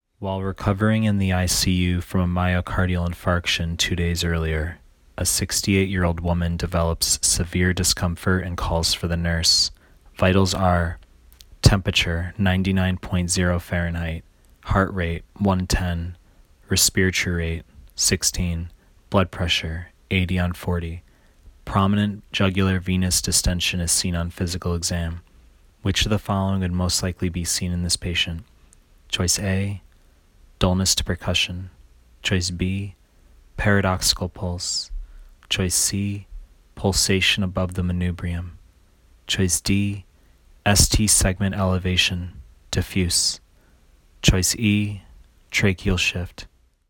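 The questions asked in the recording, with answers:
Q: Which of the following would most likely be seen in this patient?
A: B: paradoxical pulse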